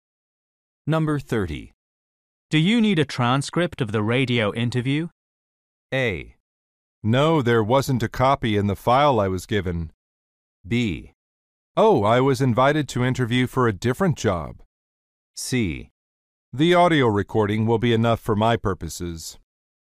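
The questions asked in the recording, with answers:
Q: Do you need a transcript of the radio interview?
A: C: The audio recording will be enough for my purposes.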